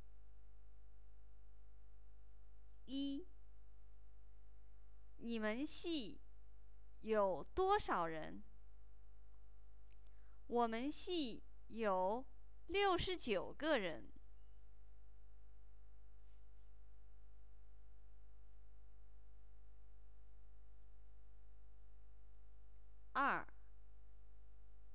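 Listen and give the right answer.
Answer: 69个人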